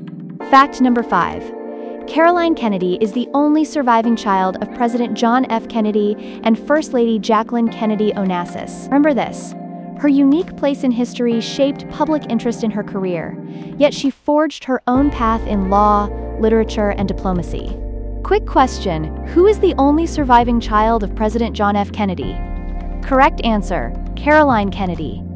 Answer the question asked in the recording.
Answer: Caroline Kennedy.